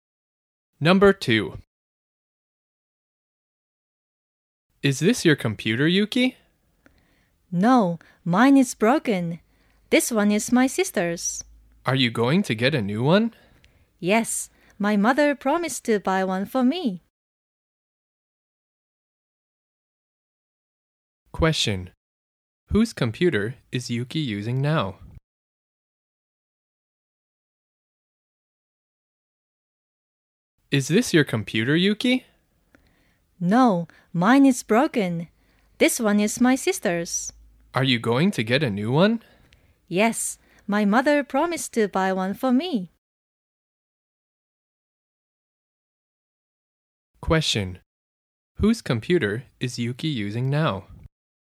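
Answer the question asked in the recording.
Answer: Her sister's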